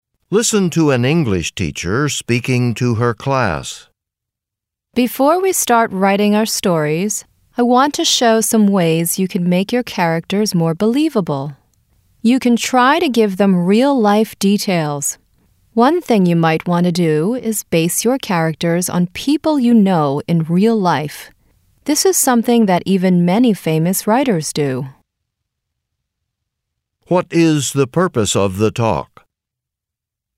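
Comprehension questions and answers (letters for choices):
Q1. What is the purpose of the talk?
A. To help students understand the characters they are reading about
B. To advise students on ways they can improve their writing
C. To praise the students who wrote the best stories in class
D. To describe the lives of some famous writers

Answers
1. B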